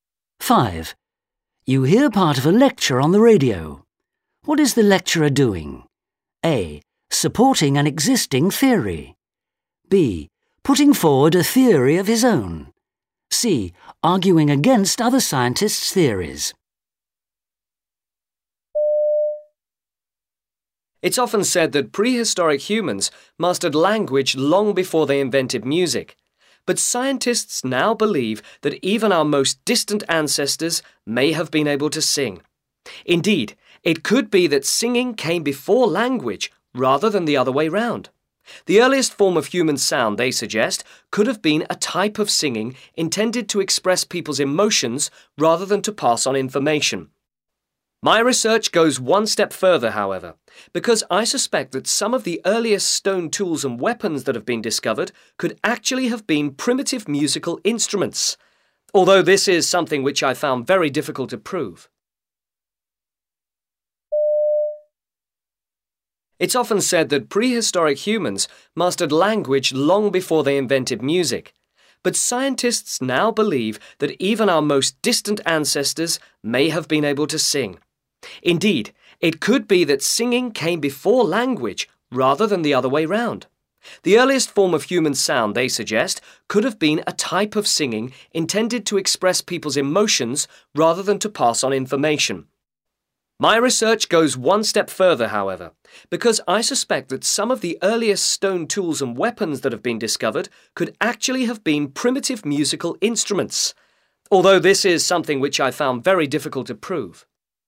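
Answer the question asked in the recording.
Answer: B: Putting forward a theory of his own.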